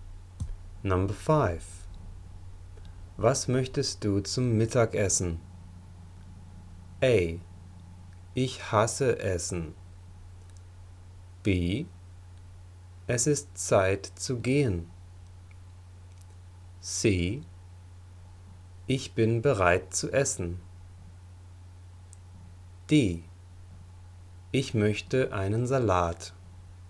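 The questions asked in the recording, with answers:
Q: Was möchtest du zum Mittagessen?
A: D: Ich möchte einen Salat.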